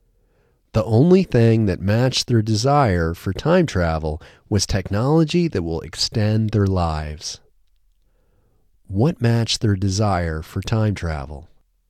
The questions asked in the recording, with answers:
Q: What matched their desire for time travel?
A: Technology that will extend their lives matched their desire for time travel.